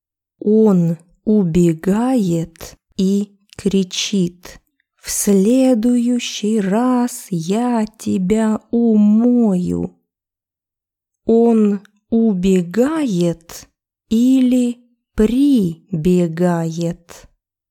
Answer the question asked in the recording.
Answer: Он убегает. Убегает из комнаты и кричит.